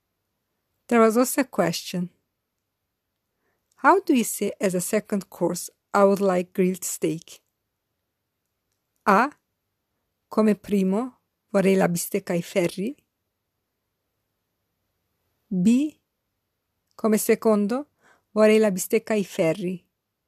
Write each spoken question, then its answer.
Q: How do you say as a second course, I would like grilled steak?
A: The correct answer is B. Come secondo, vorrei la bistecca ai ferri.